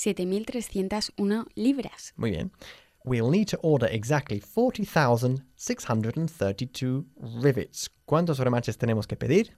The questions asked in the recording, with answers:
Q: ¿Cuántos remaches tenemos que pedir?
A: 40,632 remaches.